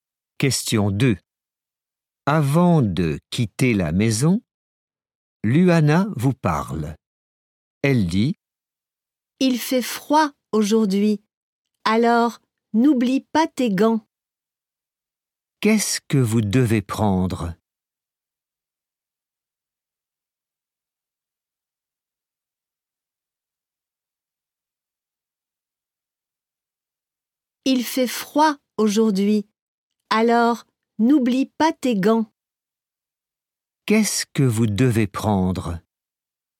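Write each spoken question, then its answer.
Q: Qu'est-ce que vous devez prendre?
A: Des gants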